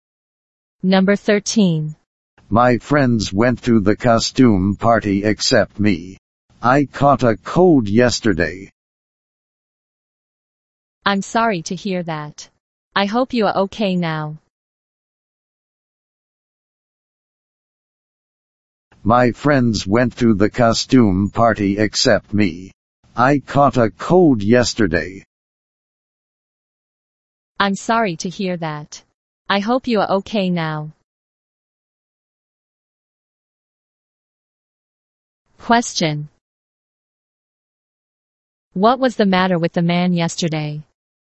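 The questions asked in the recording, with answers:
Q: What was the matter with the man yesterday?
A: He caught a cold.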